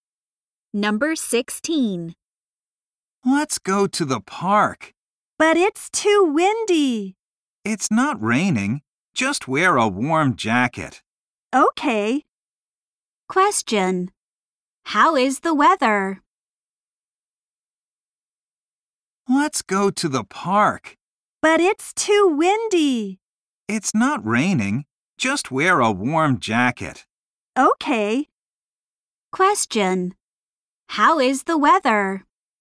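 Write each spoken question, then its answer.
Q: How is the weather?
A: It's windy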